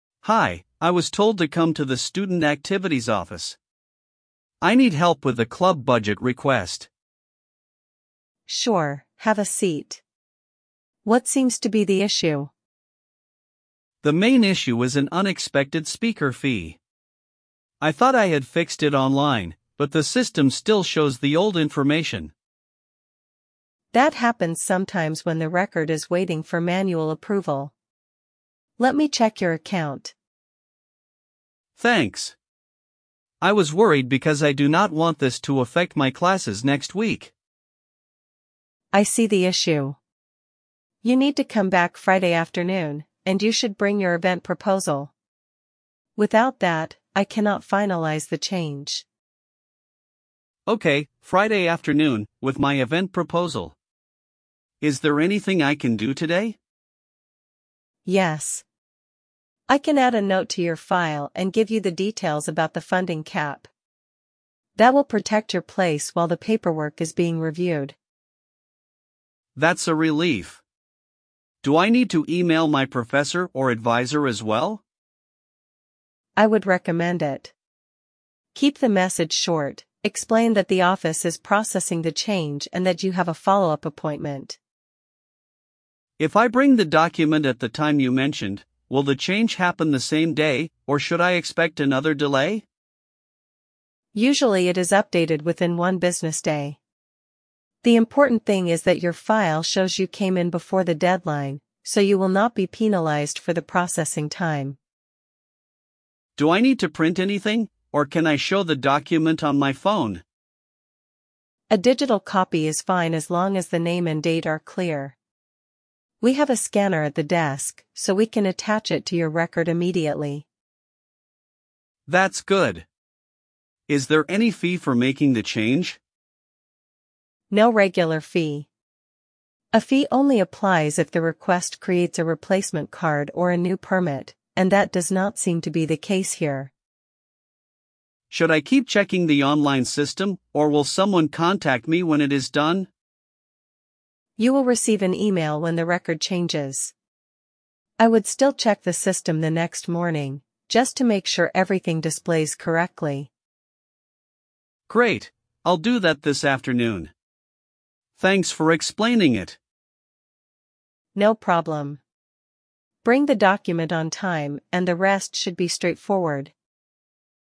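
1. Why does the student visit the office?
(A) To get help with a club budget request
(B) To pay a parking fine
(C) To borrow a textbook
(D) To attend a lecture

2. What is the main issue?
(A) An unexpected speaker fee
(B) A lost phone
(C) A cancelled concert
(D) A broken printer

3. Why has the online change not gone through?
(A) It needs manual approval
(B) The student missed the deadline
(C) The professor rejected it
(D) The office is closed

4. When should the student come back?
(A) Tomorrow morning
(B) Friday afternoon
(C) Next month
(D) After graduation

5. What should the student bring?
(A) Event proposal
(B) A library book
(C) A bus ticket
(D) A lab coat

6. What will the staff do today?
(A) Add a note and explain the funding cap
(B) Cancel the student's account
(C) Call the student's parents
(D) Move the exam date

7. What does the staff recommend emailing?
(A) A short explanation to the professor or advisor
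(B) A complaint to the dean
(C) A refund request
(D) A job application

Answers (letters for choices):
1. A
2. A
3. A
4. B
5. A
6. A
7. A

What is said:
Student: Hi, I was told to come to the student activities office. I need help with a club budget request.
Staff: Sure, have a seat. What seems to be the issue?
Student: The main issue is an unexpected speaker fee. I thought I had fixed it online, but the system still shows the old information.
Staff: That happens sometimes when the record is waiting for manual approval. Let me check your account.
Student: Thanks. I was worried because I do not want this to affect my classes next week.
Staff: I see the issue. You need to come back Friday afternoon, and you should bring your event proposal. Without that, I cannot finalise the change.
Student: Okay, Friday afternoon, with my event proposal. Is there anything I can do today?
Staff: Yes. I can add a note to your file and give you the details about the funding cap. 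That will protect your place while the paperwork is being reviewed.
Student: That's a relief. Do I need to email my professor or advisor as well?
Staff: I would recommend it. Keep the message short: explain that the office is processing the change and that you have a follow-up appointment.
Student: If I bring the document at the time you mentioned, will the change happen the same day, or should I expect another delay?
Staff: Usually it is updated within one business day. The important thing is that your file shows you came in before the deadline, so you will not be penalised for the processing time.
Student: Do I need to print anything, or can I show the document on my phone?
Staff: A digital copy is fine as long as the name and date are clear. We have a scanner at the desk, so we can attach it to your record immediately.
Student: That's good. Is there any fee for making the change?
Staff: No regular fee. 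A fee only applies if the request creates a replacement card or a new permit, and that does not seem to be the case here.
Student: Should I keep checking the online system, or will someone contact me when it is done?
Staff: You will receive an email when the record changes. I would still check the system the next morning, just to make sure everything displays correctly.
Student: Great, I'll do that this afternoon. Thanks for explaining it.
Staff: No problem. Bring the document on time, and the rest should be straightforward.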